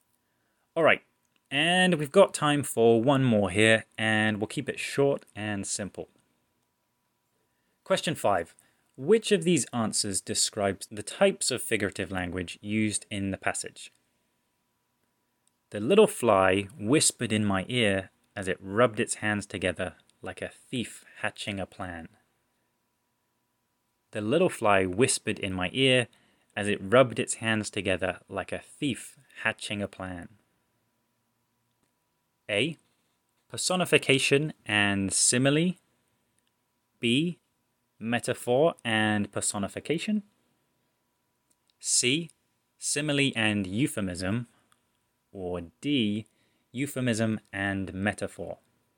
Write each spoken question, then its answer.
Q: Which of these answers describes the types of figurative language used in the passage?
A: So, our answer is A, personification and simile.